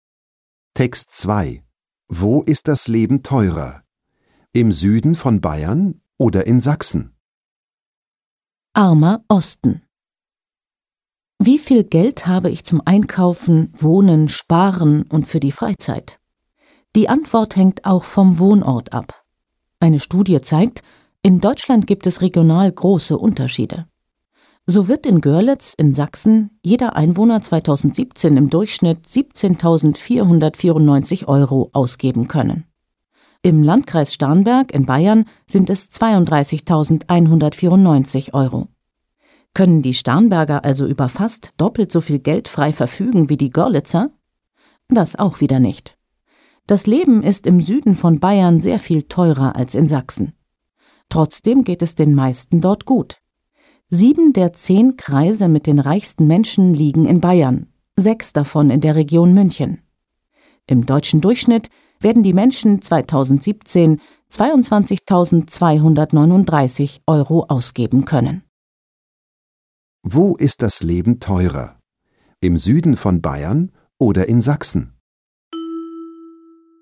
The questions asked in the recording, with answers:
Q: Wo ist das Leben teurer? Im Süden von Bayern oder in Sachsen?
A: Das Leben ist im Süden von Bayern teurer.